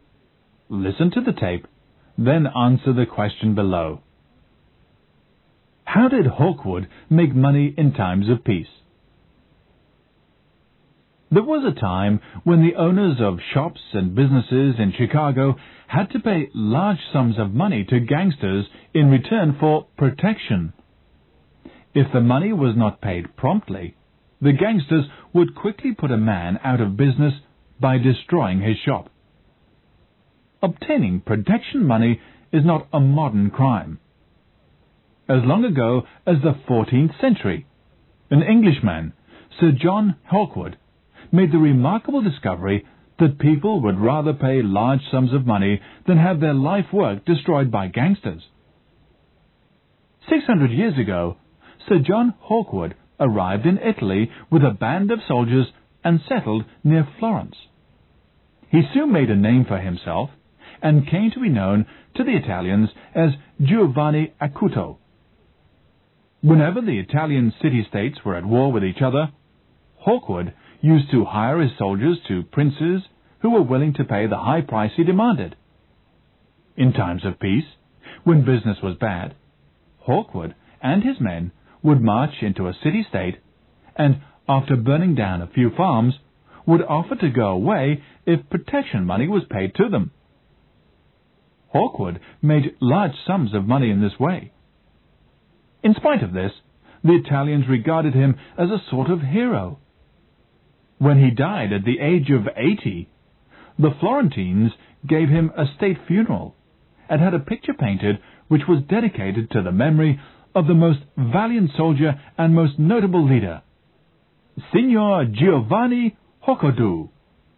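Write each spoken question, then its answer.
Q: How did Hawkwood make money in times of peace?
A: By marching into city-states, burning a few farms, and demanding protection money to go away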